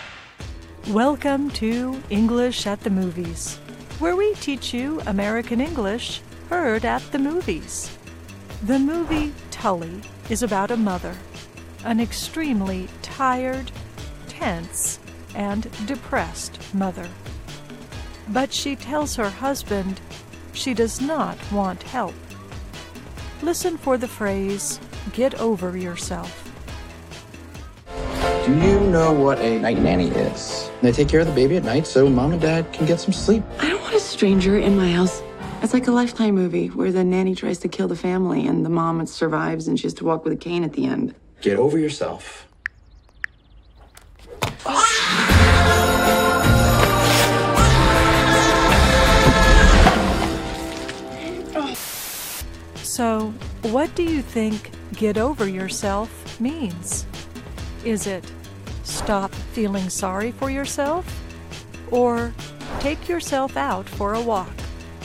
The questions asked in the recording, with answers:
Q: So, what do you think get over yourself means?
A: Get over yourself means stop feeling sorry for yourself.